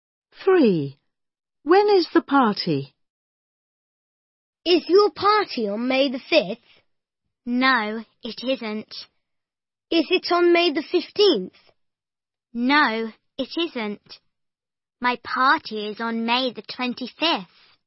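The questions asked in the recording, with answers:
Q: When is the party?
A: On May the 25th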